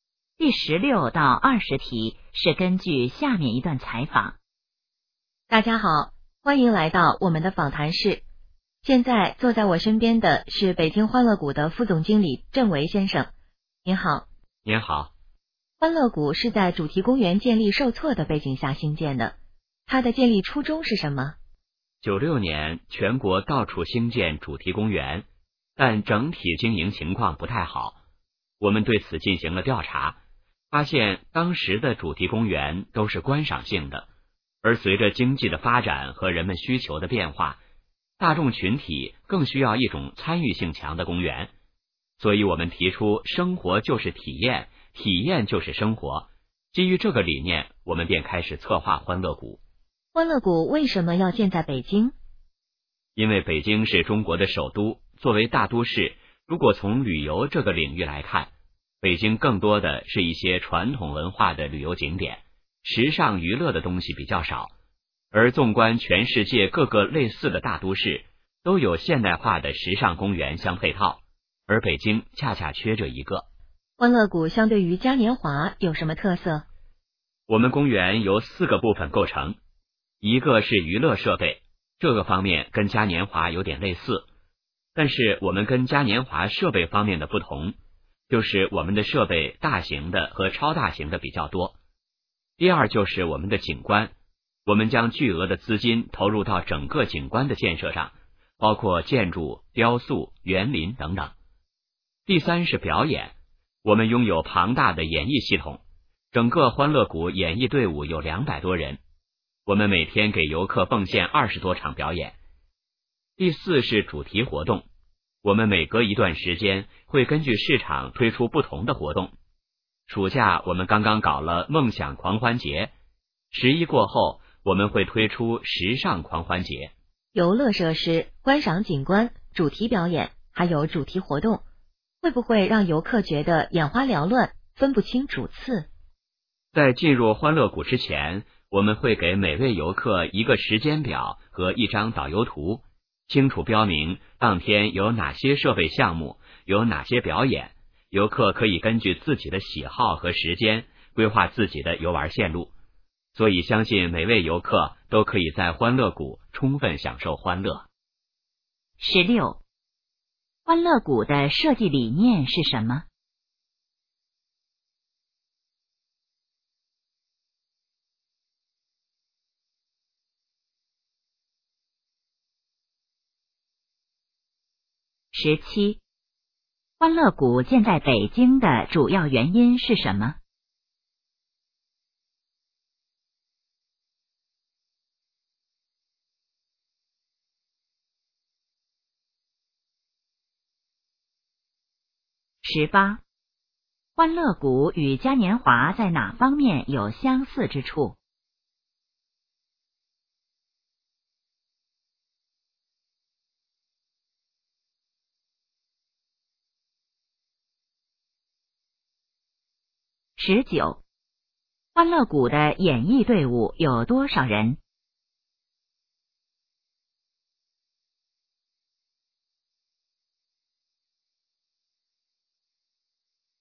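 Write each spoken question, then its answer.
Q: 欢乐谷的设计理念是什么?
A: 生活就是体验,体验就是生活

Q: 欢乐谷建在北京的主要原因是什么?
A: 北京缺少现代化的时尚娱乐公园

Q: 欢乐谷与嘉年华在哪方面有相似之处?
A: 娱乐设备

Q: 欢乐谷的演艺队伍有多少人?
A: 200多人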